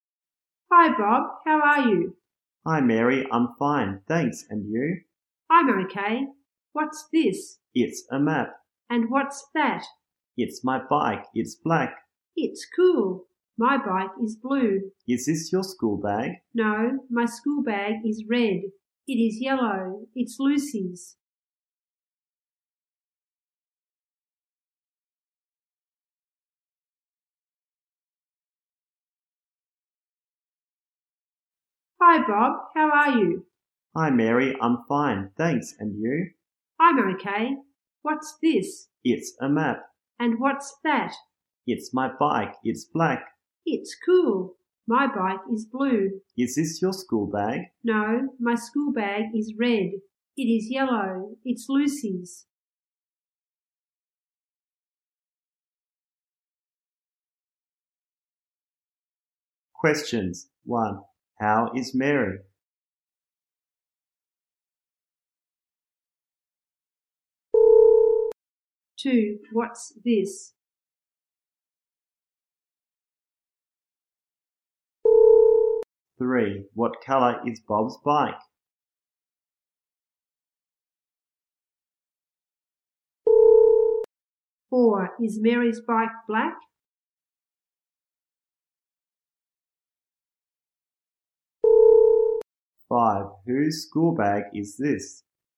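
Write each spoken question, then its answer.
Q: How is Mary?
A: She's okay

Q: What's this?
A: A map

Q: What color is Bob's bike?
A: Black

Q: Is Mary's bike black?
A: No, it's blue

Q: Whose school bag is this?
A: Lucy's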